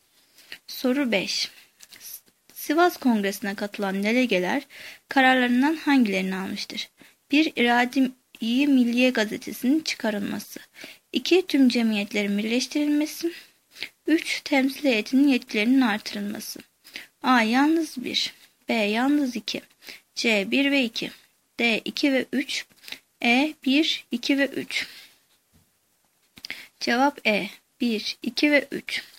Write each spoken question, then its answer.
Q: Sivas Kongresi'ne katılan delegeler kararlarından hangilerini almıştır?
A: Cevap E. 1, 2 ve 3.